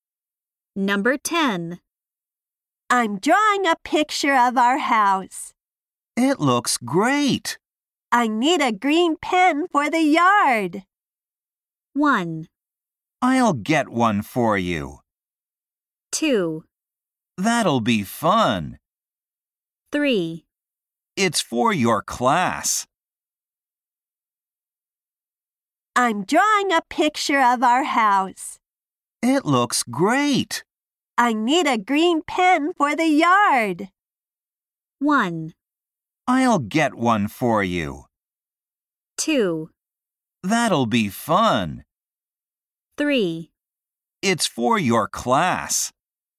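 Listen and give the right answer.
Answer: 1: I'll get one for you.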